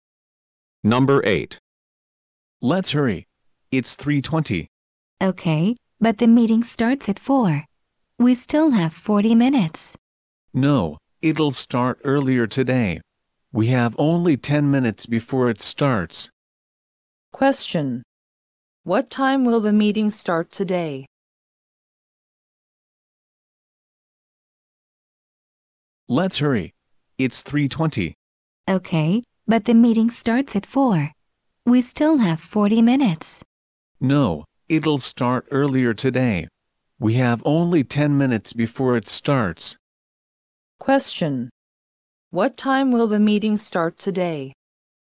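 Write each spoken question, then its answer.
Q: What time will the meeting start today?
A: At 3:30.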